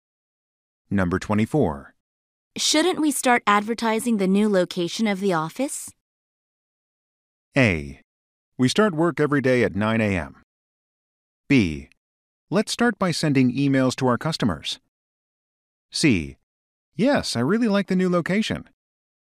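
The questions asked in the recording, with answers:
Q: Shouldn't we start advertising the new location of the office?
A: B: Let's start by sending emails to our customers.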